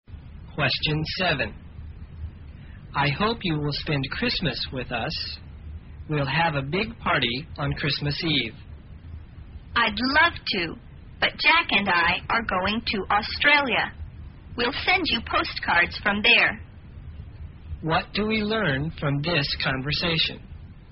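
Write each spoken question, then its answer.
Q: What do we learn from this conversation?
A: She can't spend Christmas with them because she and Jack are going to Australia.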